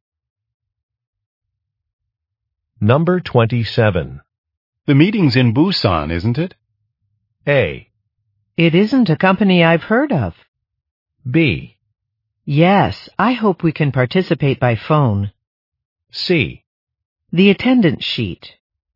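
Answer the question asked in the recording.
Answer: B: Yes, I hope we can participate by phone.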